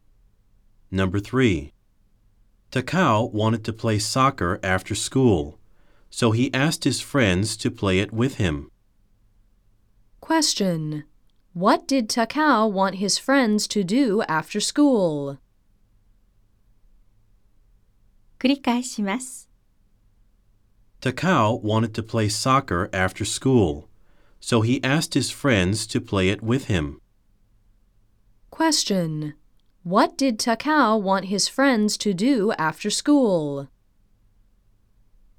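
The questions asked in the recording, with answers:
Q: What did Takao want his friends to do after school?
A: Play soccer with him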